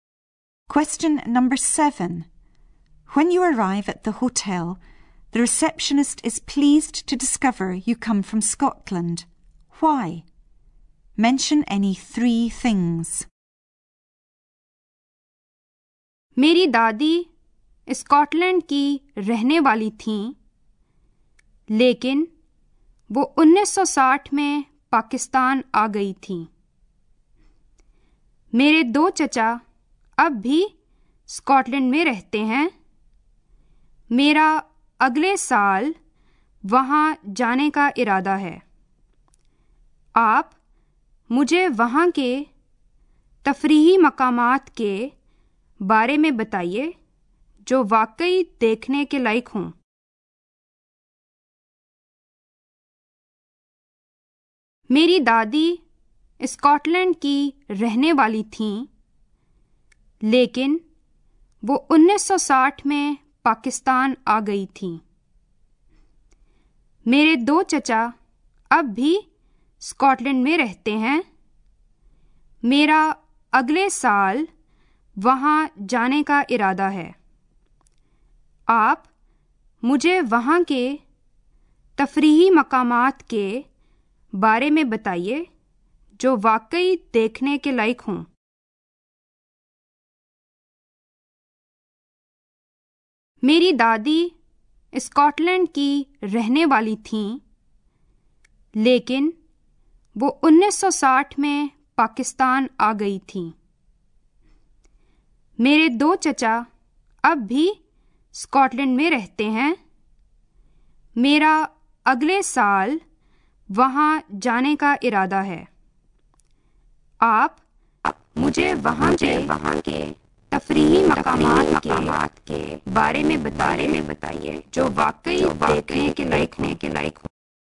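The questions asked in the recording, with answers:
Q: Why? Mention any three things.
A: Her grandmother was from Scotland; two uncles still live in Scotland; she plans to go there next year and wants to know places worth visiting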